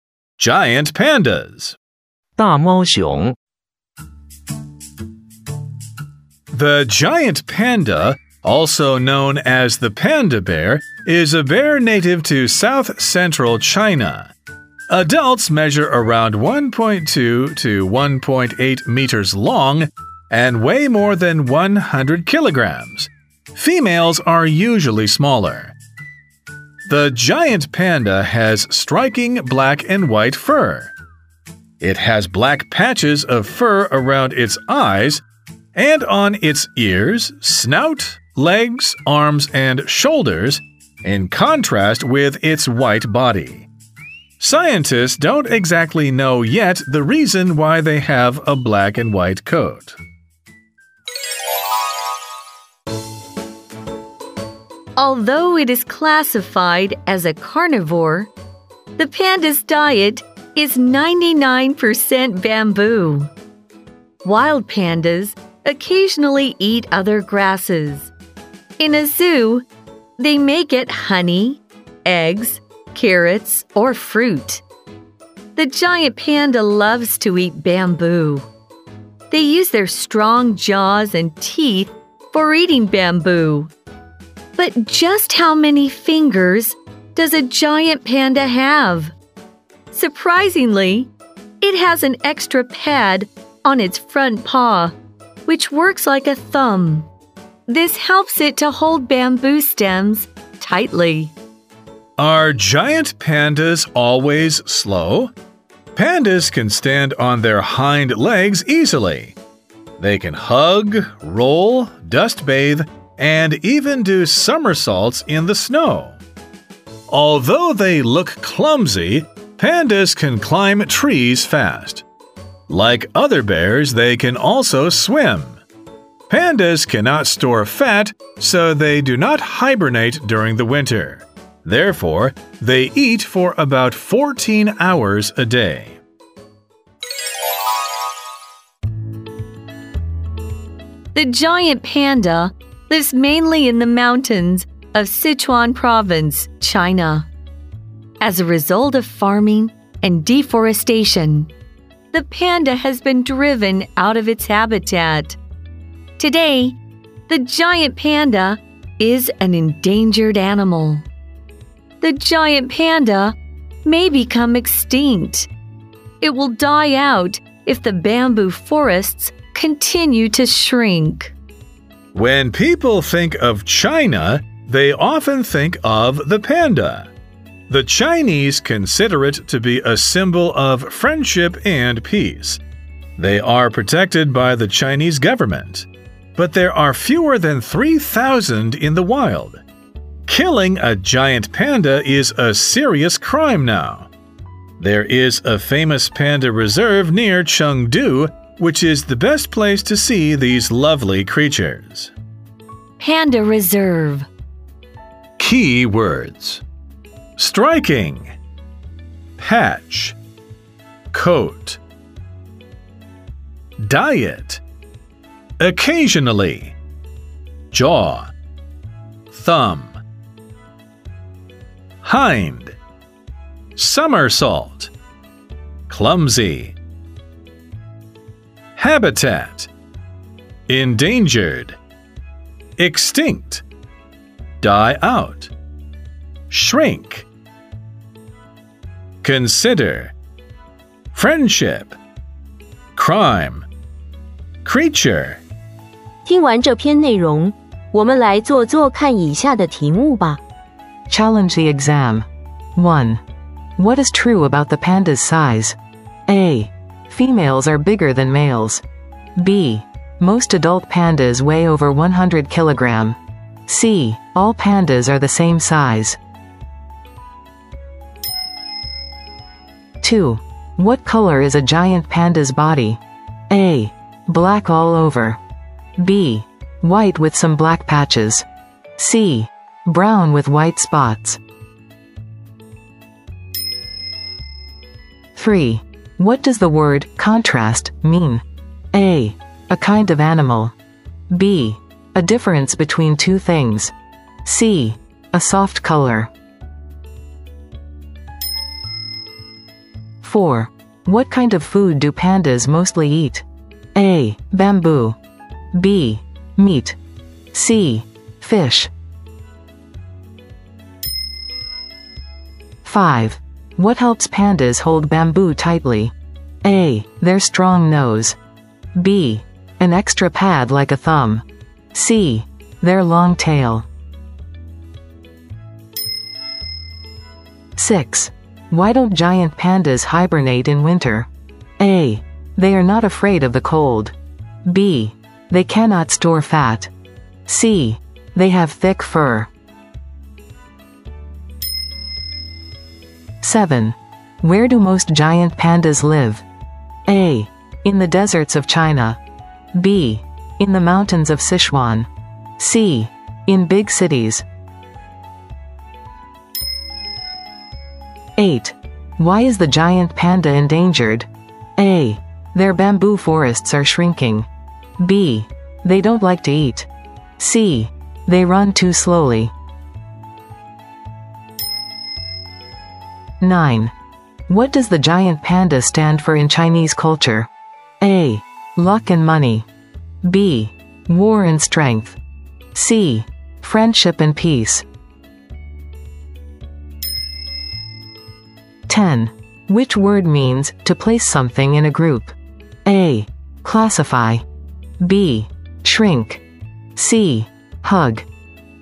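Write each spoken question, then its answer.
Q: What is true about the panda's size?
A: B: Most adult pandas weigh over 100 kilograms.

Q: What color is a giant panda's body?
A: B: White with some black patches.

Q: What does the word contrast mean?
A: B: A difference between two things.

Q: What kind of food do pandas mostly eat?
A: A: Bamboo.

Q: What helps pandas hold bamboo tightly?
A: B: An extra pad like a thumb.

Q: Why don't giant pandas hibernate in winter?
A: B: They cannot store fat.

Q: Where do most giant pandas live?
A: B: In the mountains of Sichuan.

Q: Why is the giant panda endangered?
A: A: Their bamboo forests are shrinking.

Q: What does the giant panda stand for in Chinese culture?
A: C: Friendship and peace.

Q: Which word means to place something in a group?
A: A: Classify.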